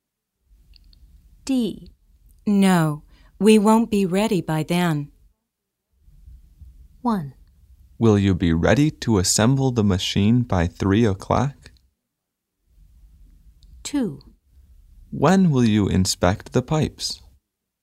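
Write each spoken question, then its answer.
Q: No, we won't be ready by then.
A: 1: Will you be ready to assemble the machine by 3 o'clock?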